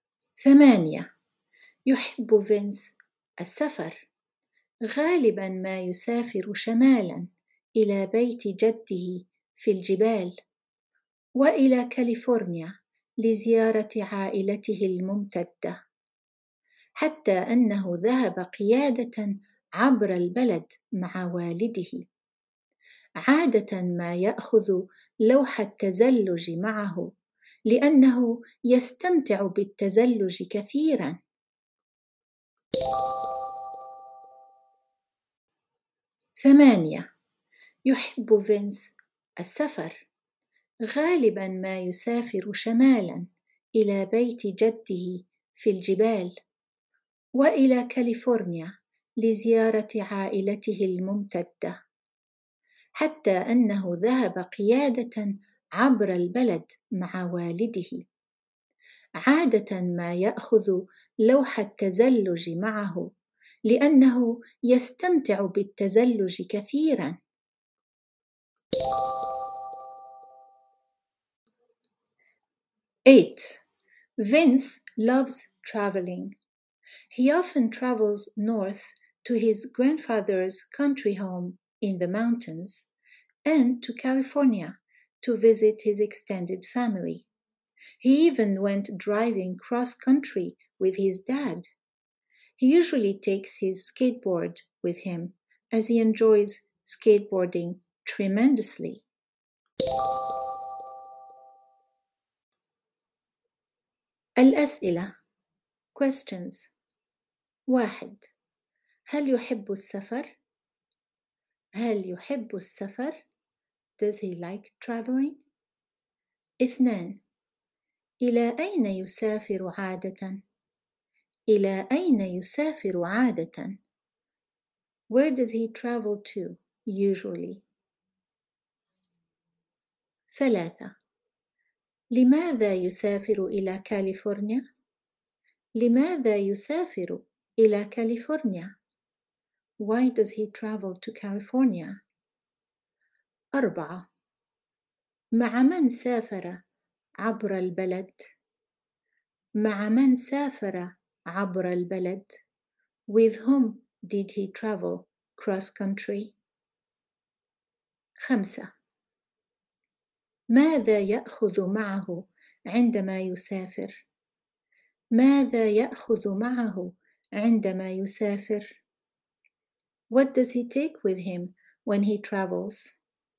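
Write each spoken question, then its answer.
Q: هل يحب السفر؟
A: نعم، يحب السفر

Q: إلى أين يسافر عادةً؟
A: شمالا إلى بيت جده في الجبال وإلى كاليفورنيا

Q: لماذا يسافر إلى كاليفورنيا؟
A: لزيارة عائلته الممتدة

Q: مع من سافر عبر البلد؟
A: مع والده

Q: ماذا يأخذ معه عندما يسافر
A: لوح التزلج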